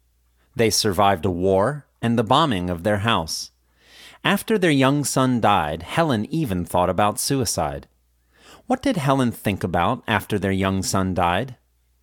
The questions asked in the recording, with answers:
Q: What did Helen think about after their young son died?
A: Helen thought about suicide after their young son died